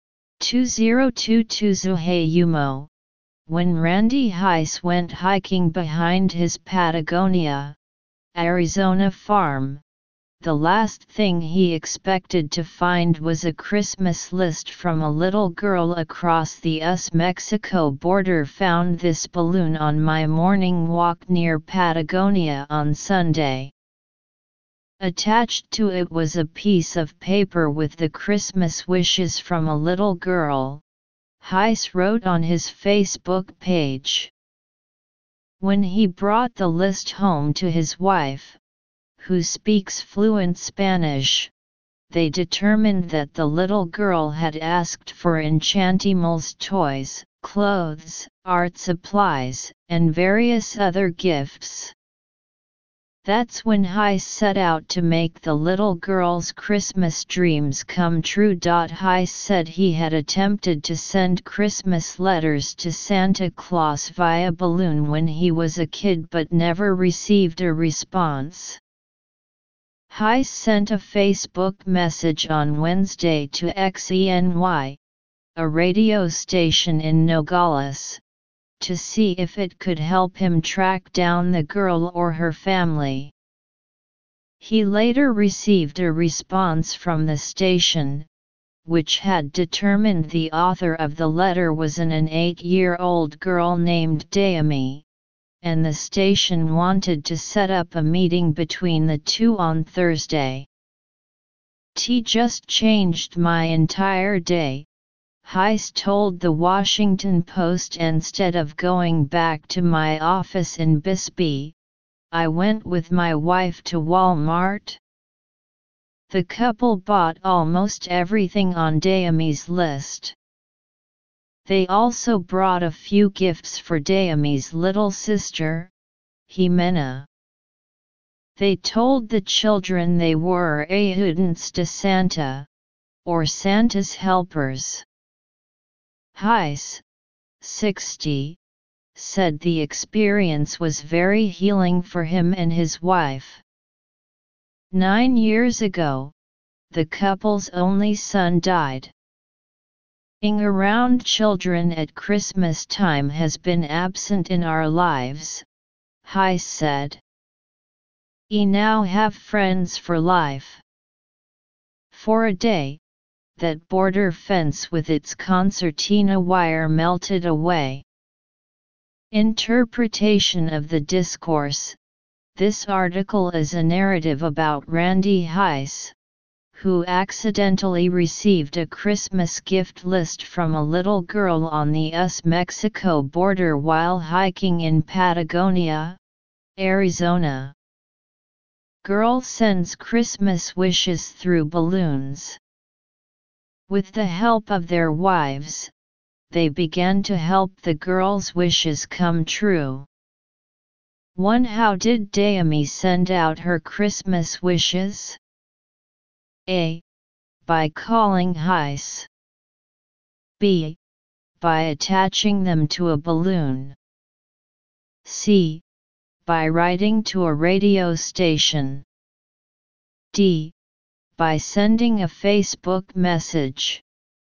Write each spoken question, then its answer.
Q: How did Dayami send out her Christmas wishes?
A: Analysis: choose B, reasoning and judgment questions.